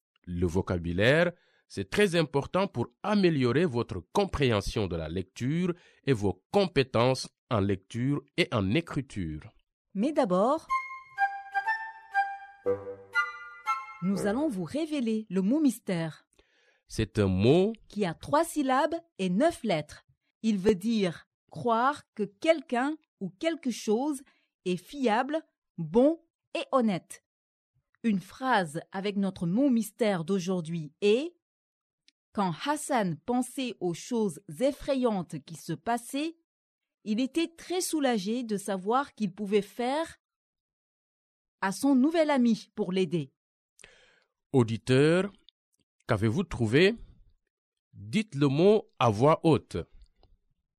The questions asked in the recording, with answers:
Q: Auditeur, qu'avez-vous trouvé?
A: Le mot mystère d'aujourd'hui est confiance.